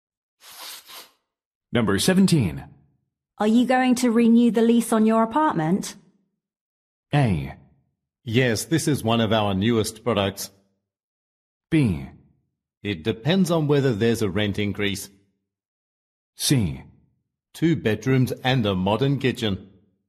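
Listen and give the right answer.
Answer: B: It depends on whether there's a rent increase.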